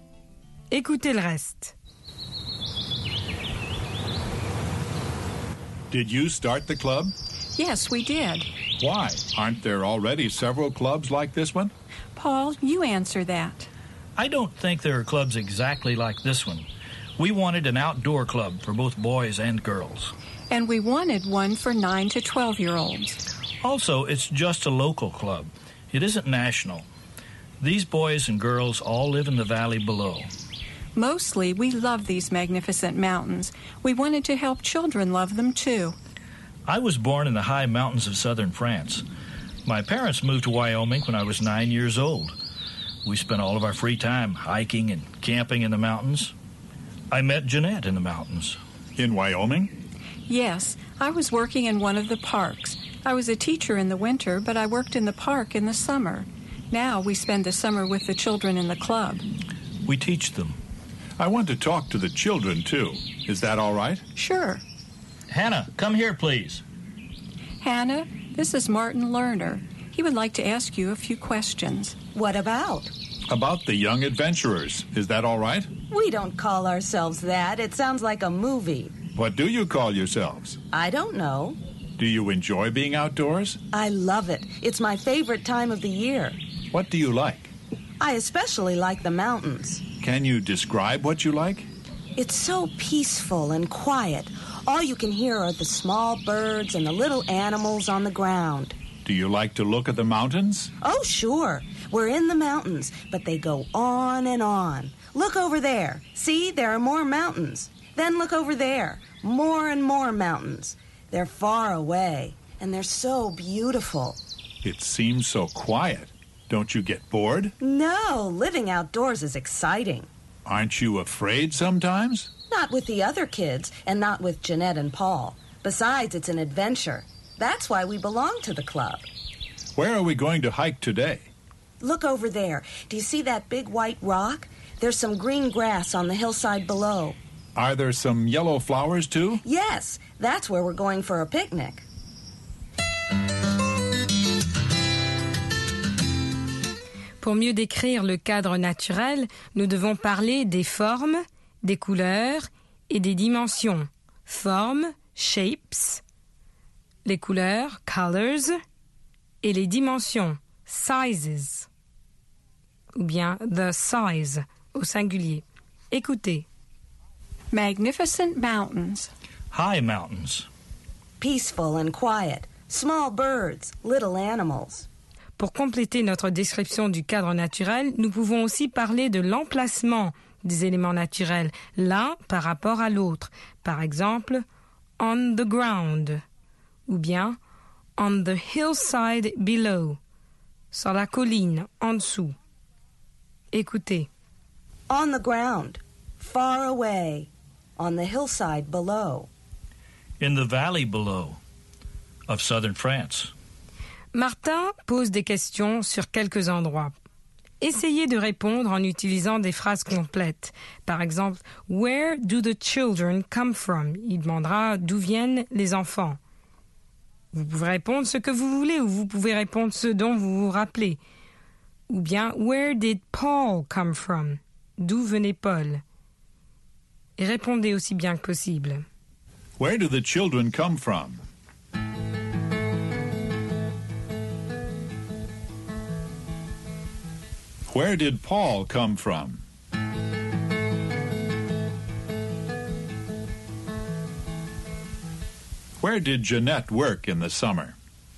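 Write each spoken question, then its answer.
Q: Where do the children come from?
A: They live in the valley below.

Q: Where did Paul come from?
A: From the high mountains of southern France.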